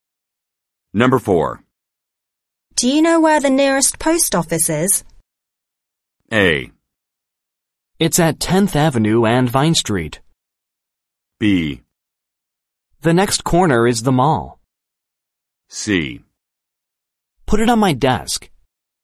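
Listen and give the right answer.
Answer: A: It's at 10th Avenue and Vine Street.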